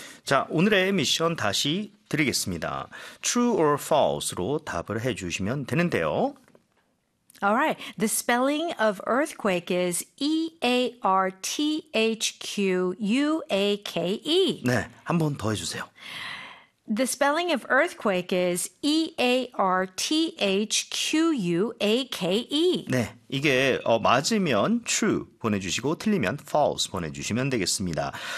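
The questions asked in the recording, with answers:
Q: The spelling of earthquake is E-A-R-T-H-Q-U-A-K-E.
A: True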